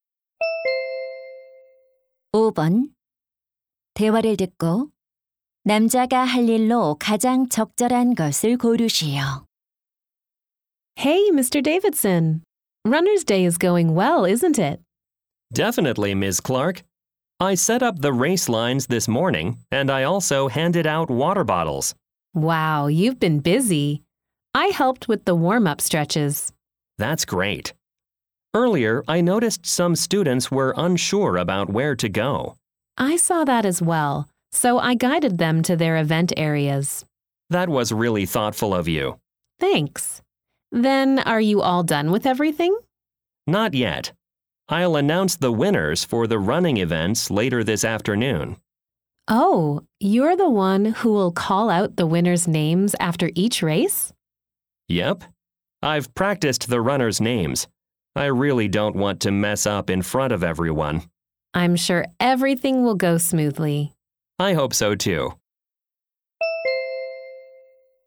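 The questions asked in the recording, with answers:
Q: 대화를 듣고 남자가 할 일로 가장 적절한 것을 고르시오.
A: 달리기 종목 우승자 발표하기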